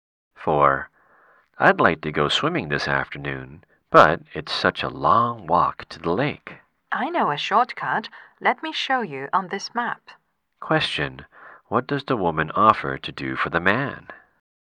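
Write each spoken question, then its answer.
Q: What does the woman offer to do for the man?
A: Show him a shortcut on the map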